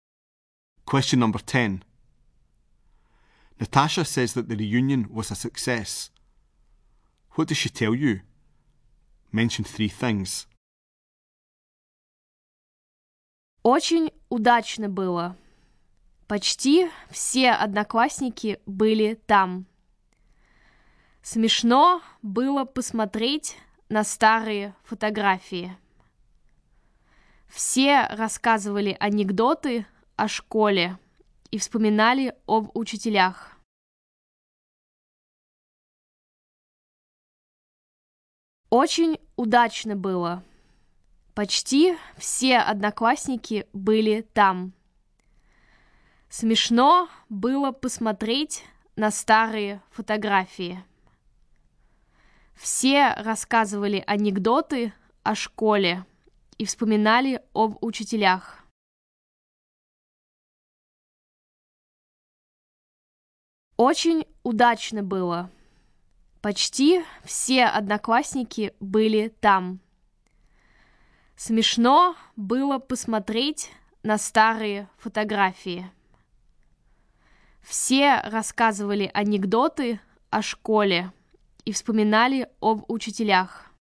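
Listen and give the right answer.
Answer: Almost all classmates came; looking at old photos was funny; everyone told jokes about school and remembered teachers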